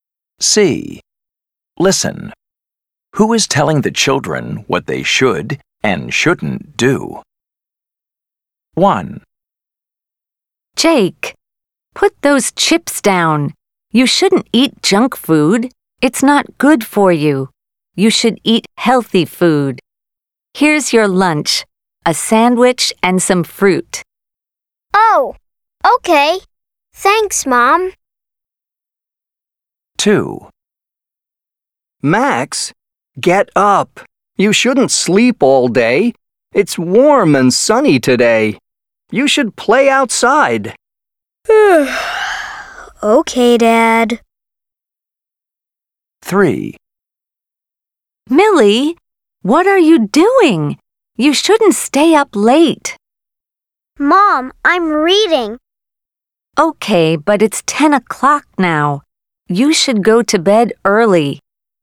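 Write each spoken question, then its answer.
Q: Who is telling the children what they should and shouldn't do?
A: Mom

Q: Who is telling the children what they should and shouldn't do?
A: Dad

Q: Who is telling the children what they should and shouldn't do?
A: Mom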